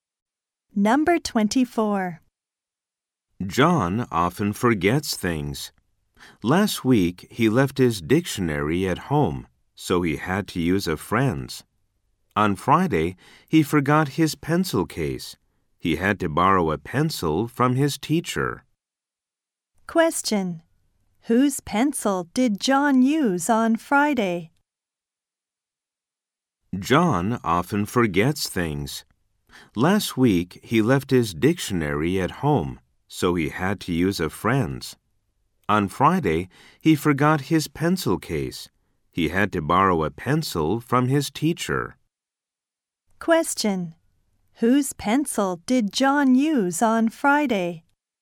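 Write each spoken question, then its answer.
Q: Whose pencil did John use on Friday?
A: His teacher's.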